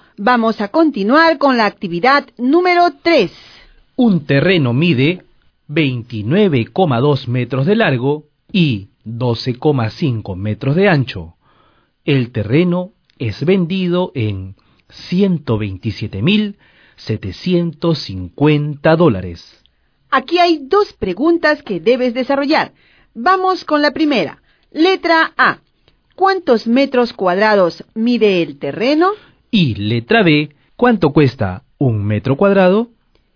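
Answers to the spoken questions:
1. 365 metros cuadrados
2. 350 dólares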